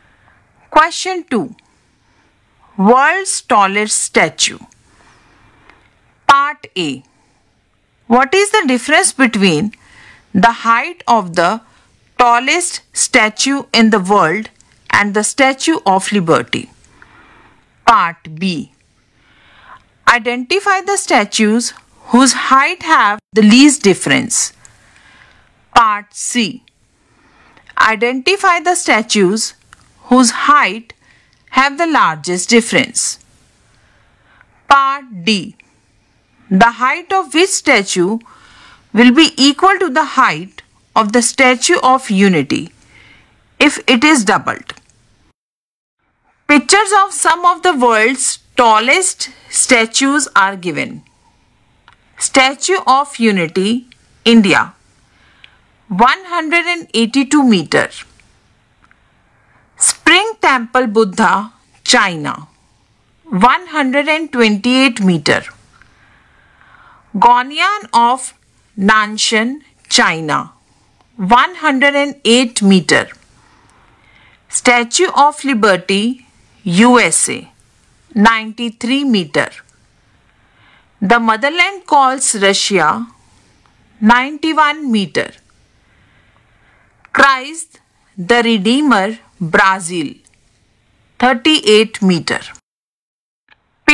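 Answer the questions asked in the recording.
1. 89 meters
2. Statue of Liberty and The Motherland Calls (2 meters)
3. Statue of Unity and Christ the Redeemer (144 meters)
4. The Motherland Calls (91 meters)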